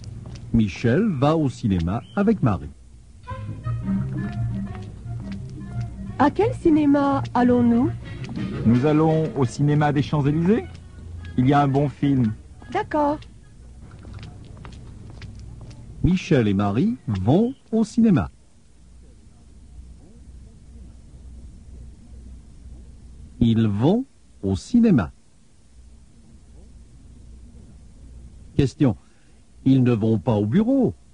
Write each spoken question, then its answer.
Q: Question. Ils ne vont pas au bureau?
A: Non, ils ne vont pas au bureau.